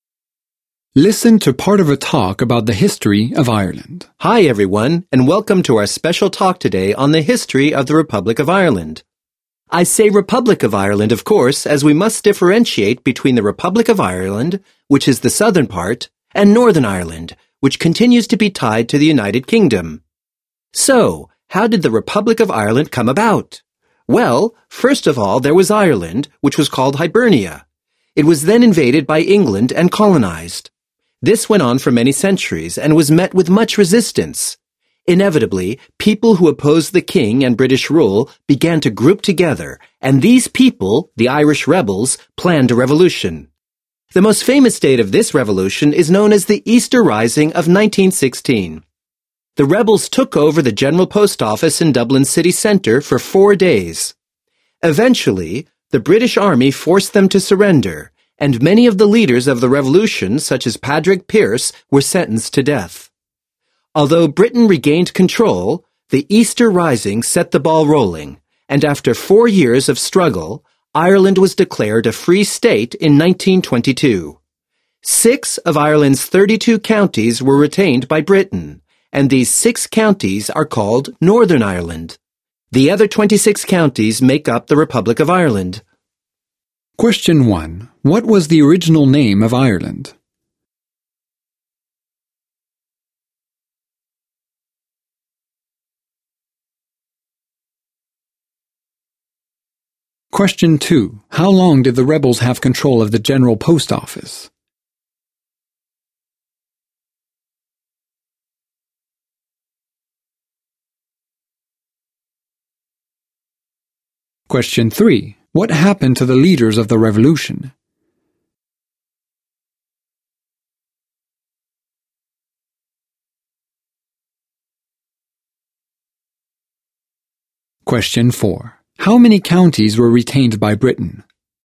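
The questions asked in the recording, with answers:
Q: What was the original name of Ireland?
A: Hibernia

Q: How long did the rebels have control of the General Post Office?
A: 4 days

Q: What happened to the leaders of the revolution?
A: Many were sentenced to death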